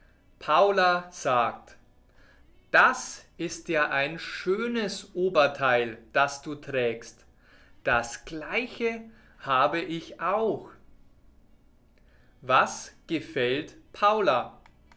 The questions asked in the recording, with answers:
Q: Was gefällt Paula?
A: Das Oberteil, das Franzi trägt.